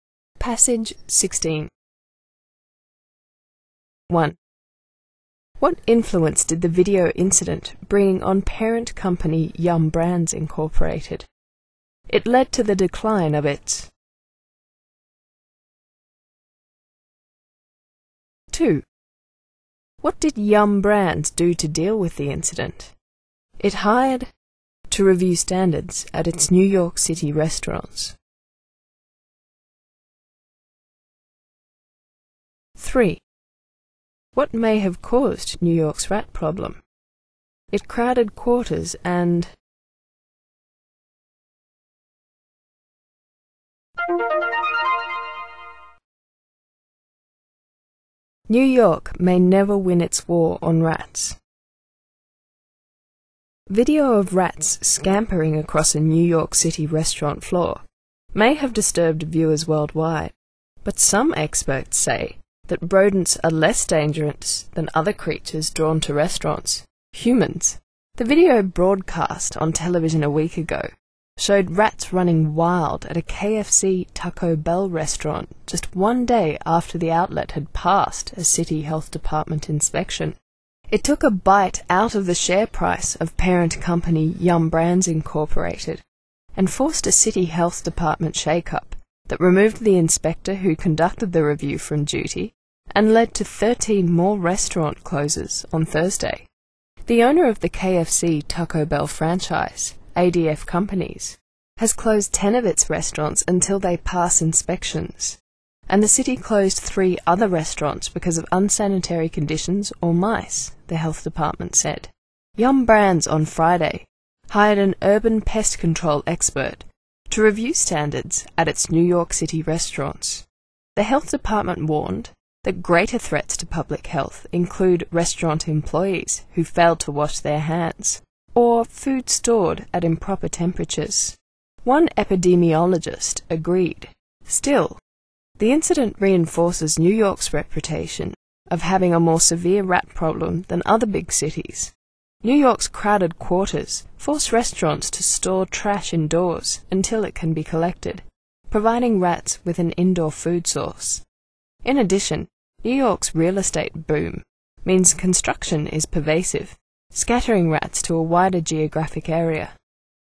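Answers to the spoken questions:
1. It led to the decline of its share price.
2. It hired an urban pest control expert to review standards at its New York City restaurants.
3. Its crowded quarters force restaurants to store trash indoors, and pervasive construction scatters rats to a wider area.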